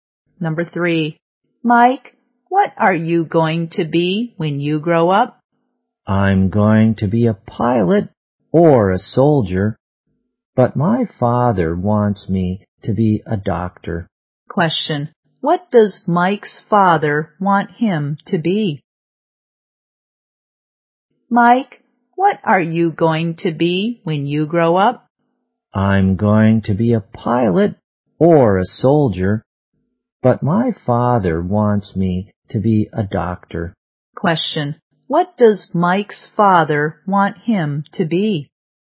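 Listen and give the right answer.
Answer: A doctor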